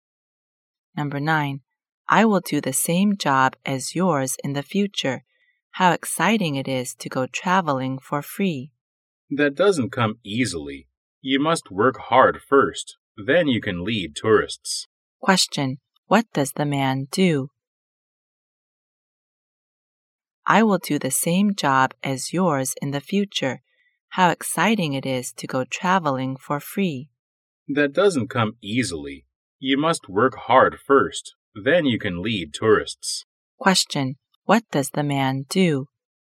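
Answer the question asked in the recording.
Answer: He is a tour guide.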